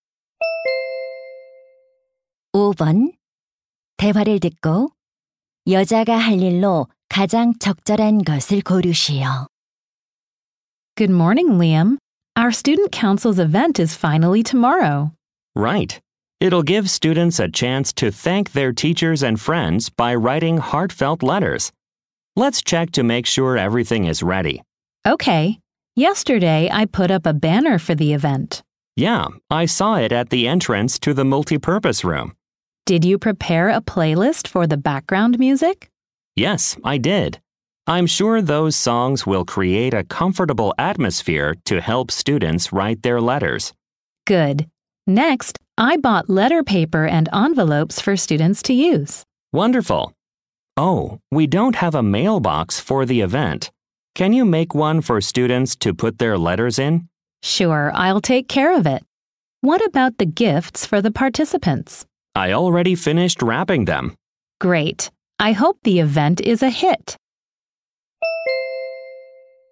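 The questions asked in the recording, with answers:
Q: 대화를 듣고 여자가 할 일로 가장 적절한 것을 고르시오.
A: 우체통(편지함) 만들기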